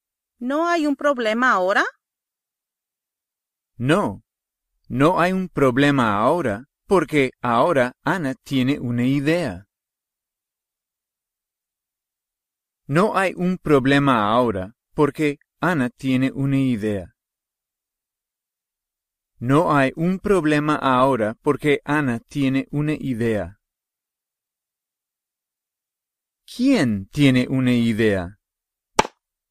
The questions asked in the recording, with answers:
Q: ¿Quién tiene una idea?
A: Ana.